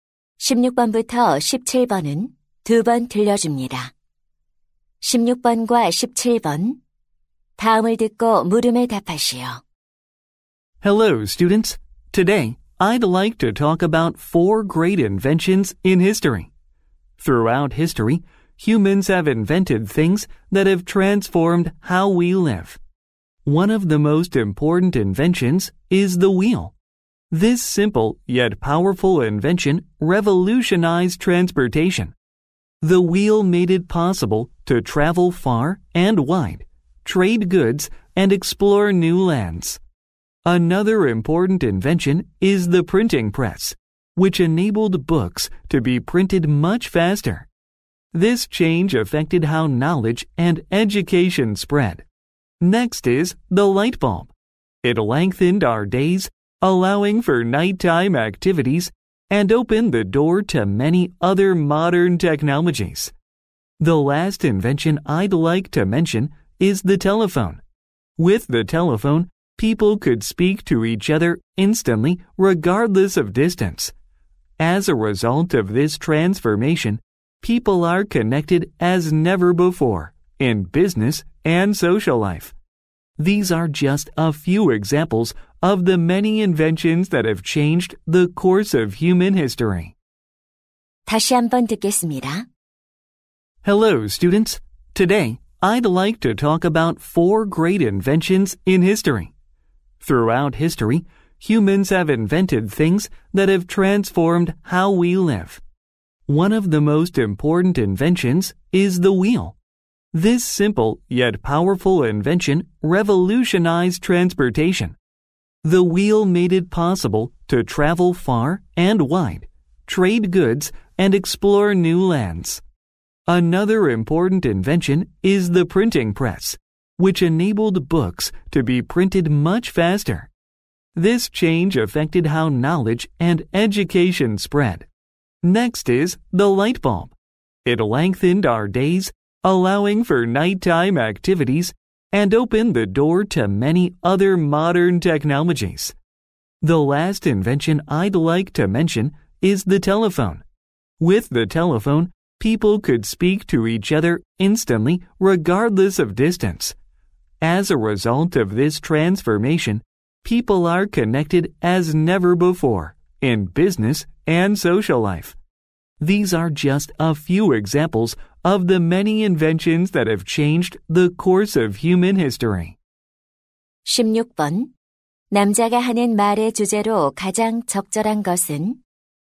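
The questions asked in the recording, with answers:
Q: 남자가 하는 말의 주제로 가장 적절한 것은?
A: 인류의 삶을 바꾼 위대한 발명품들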